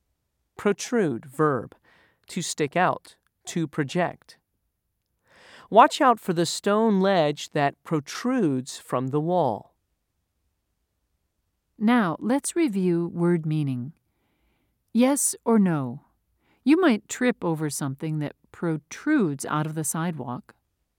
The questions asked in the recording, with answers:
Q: Yes or no? You might trip over something that protrudes out of the sidewalk.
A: If you said yes, you are correct.